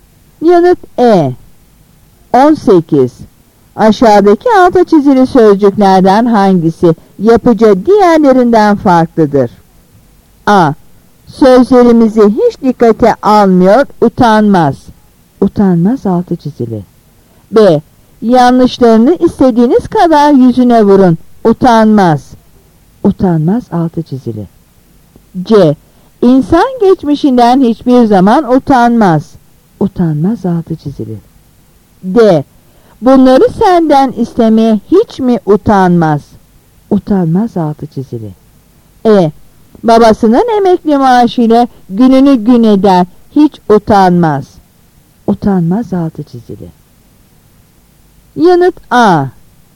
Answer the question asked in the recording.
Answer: Yanıt A.